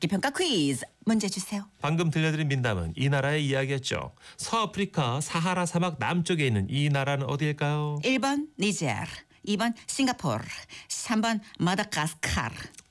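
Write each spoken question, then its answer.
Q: 서아프리카 사하라 사막 남쪽에 있는 이 나라는 어디일까요?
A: 1번 니제르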